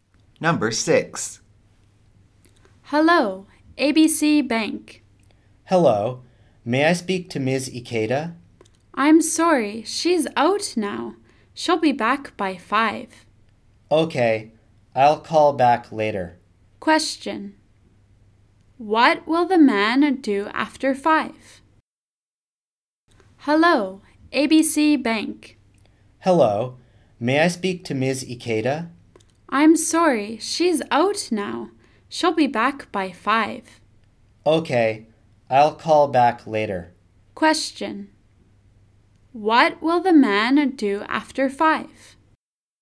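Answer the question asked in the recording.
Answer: Call Ms. Ikeda back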